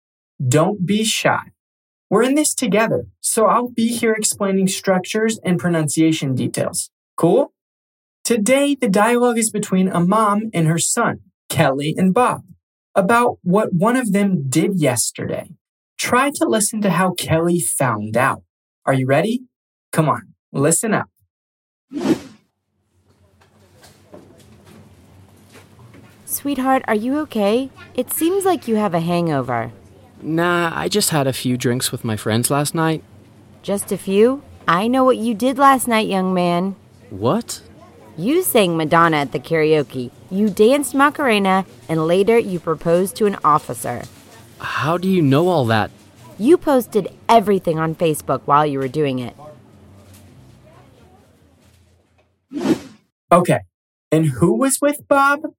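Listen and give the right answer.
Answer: His friends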